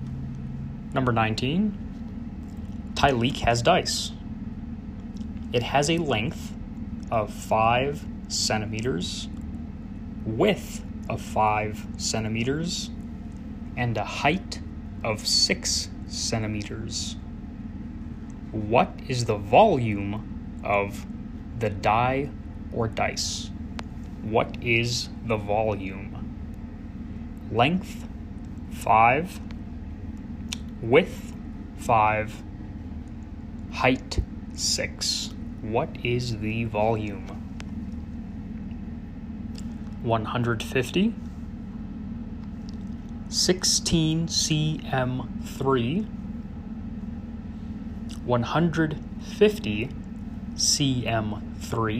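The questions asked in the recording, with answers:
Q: What is the volume of the die or dice?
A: 150 cm3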